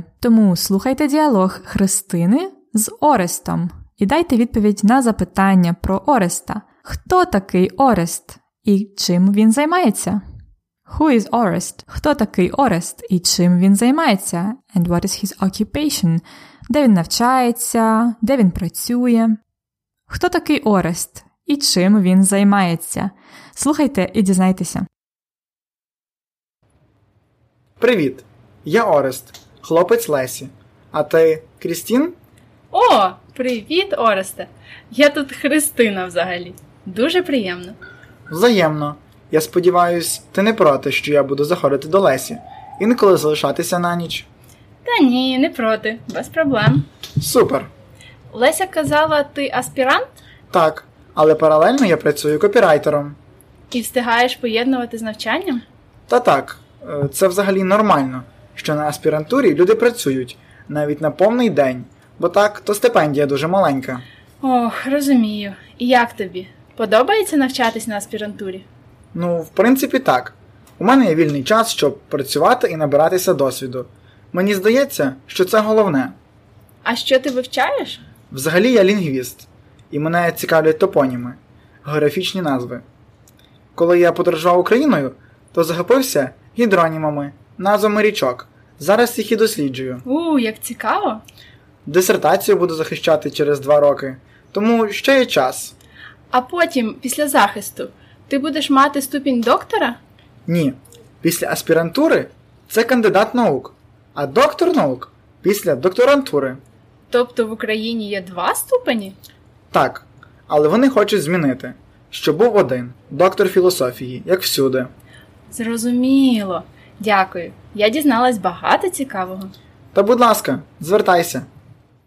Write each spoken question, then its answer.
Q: Хто такий Орест і чим він займається?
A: Орест це хлопець Лесі.